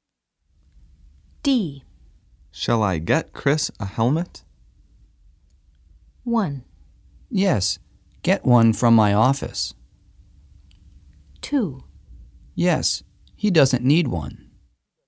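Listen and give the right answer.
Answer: 1: Yes, get one from my office.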